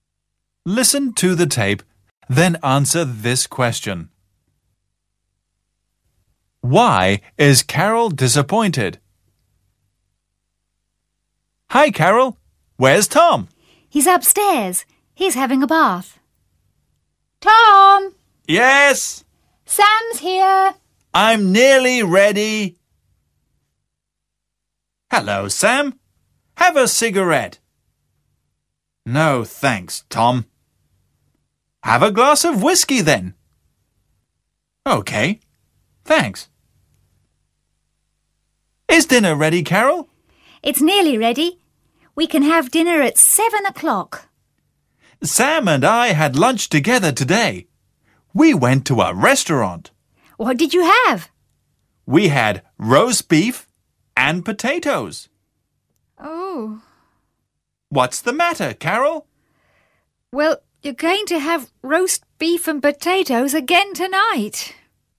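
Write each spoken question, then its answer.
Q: Why is Carol disappointed?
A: Because Tom and Sam already had roast beef and potatoes for lunch, and she is serving the same for dinner.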